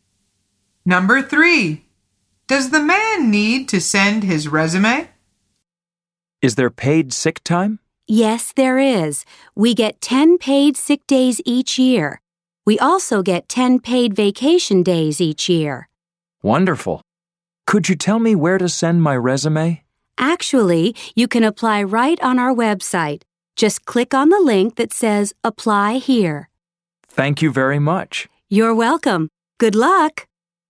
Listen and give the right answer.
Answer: The answer is no.